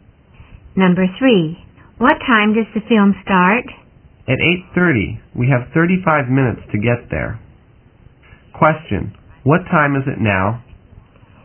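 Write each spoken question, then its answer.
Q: What time is it now?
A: 7:55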